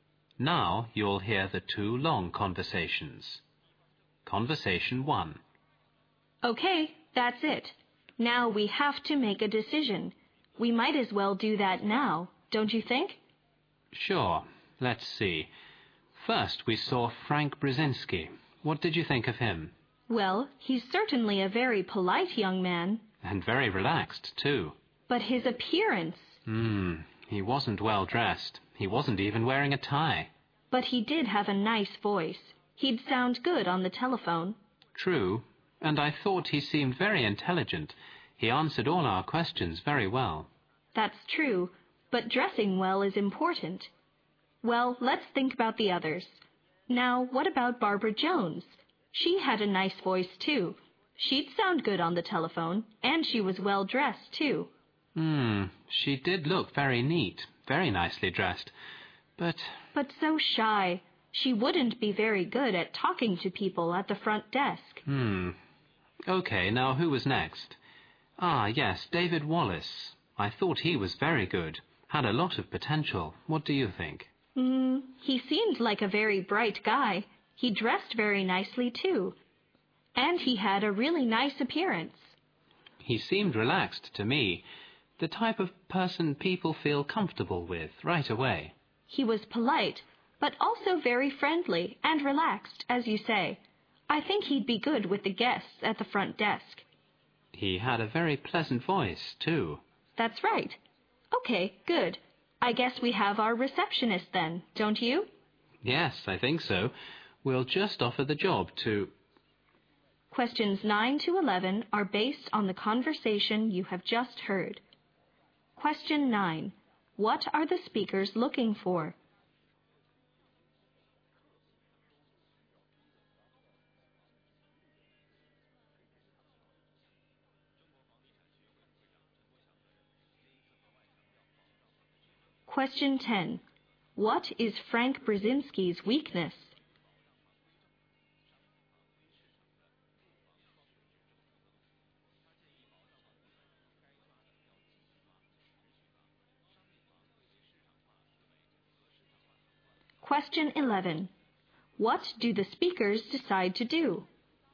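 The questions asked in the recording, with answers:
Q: What are the speakers looking for?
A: A receptionist.

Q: What is Frank Brzezinski's weakness?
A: He wasn't well dressed.

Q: What do the speakers decide to do?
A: Offer the job to David Wallace.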